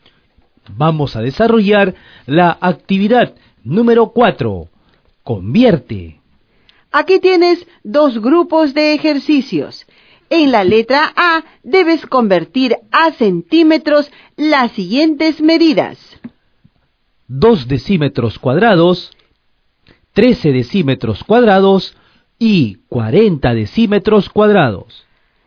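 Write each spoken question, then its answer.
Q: En la letra A, debes convertir a centímetros las siguientes medidas.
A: 200 cm2, 1300 cm2 y 4000 cm2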